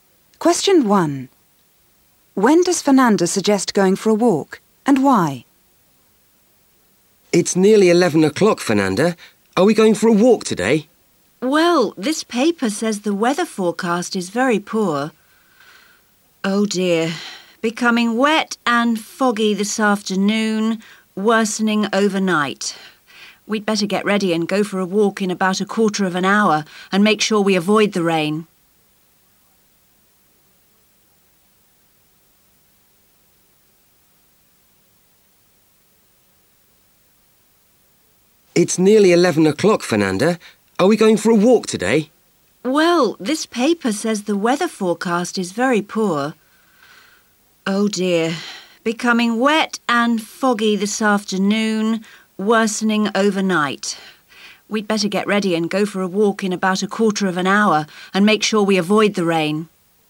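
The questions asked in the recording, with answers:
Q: When does Fernanda suggest going for a walk, and why?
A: In about a quarter of an hour, to avoid the rain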